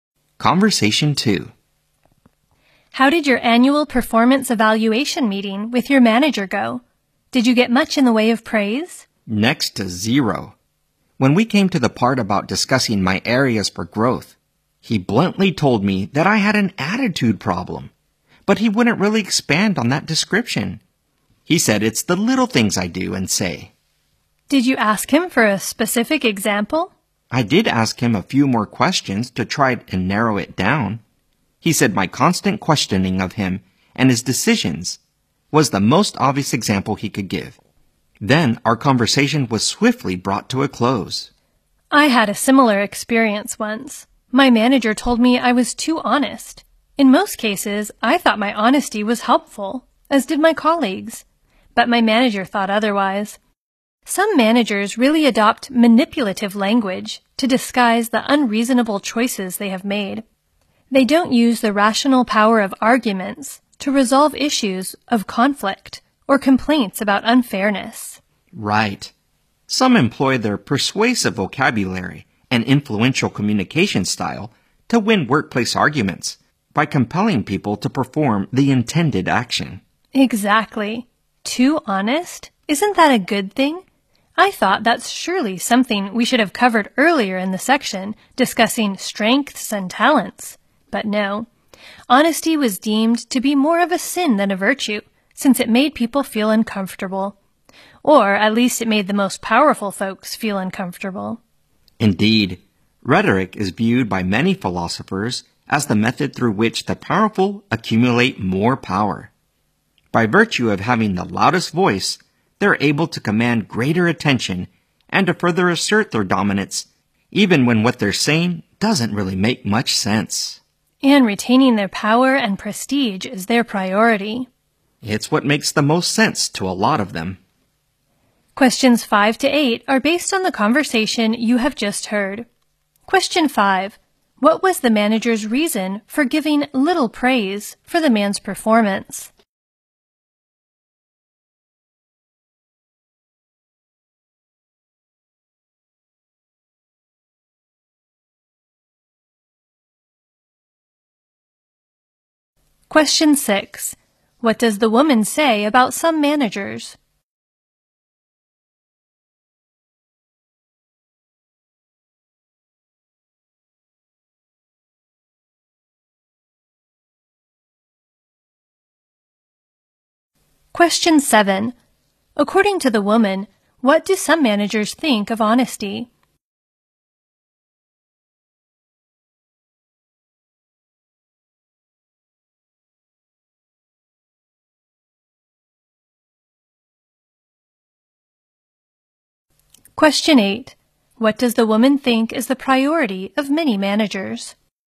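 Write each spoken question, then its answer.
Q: What was the manager's reason for giving little praise for the man's performance?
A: He thought the man had an attitude problem

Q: What does the woman say about some managers?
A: They use manipulative language to disguise their unreasonable choices

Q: According to the woman, what do some managers think of honesty?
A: It is more of a sin than a virtue because it makes people uncomfortable

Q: What does the woman think is the priority of many managers?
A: Retaining their power and prestige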